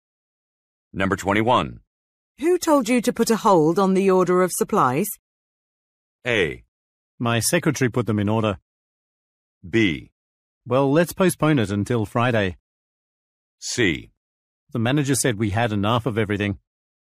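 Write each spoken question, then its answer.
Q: Who told you to put a hold on the order of supplies?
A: C: The manager said we had enough of everything.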